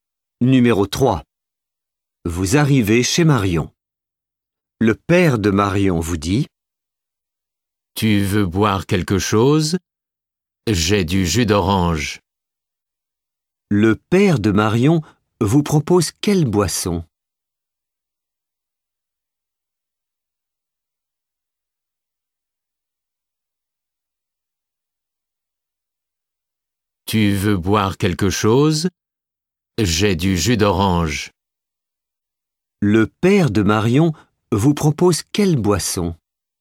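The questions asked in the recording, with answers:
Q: Le père de Marion vous propose quelle boisson ?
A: Du jus d'orange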